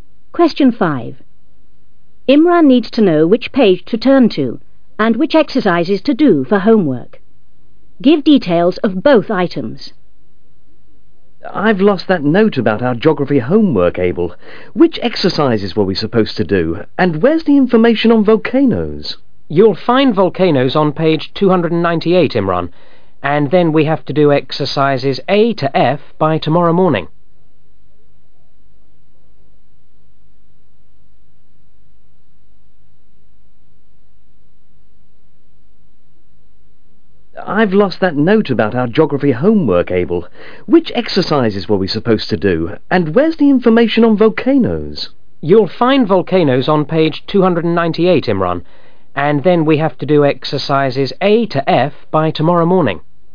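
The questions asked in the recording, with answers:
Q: Imran needs to know which page to turn to and which exercises to do for homework.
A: Page 298; exercises A to F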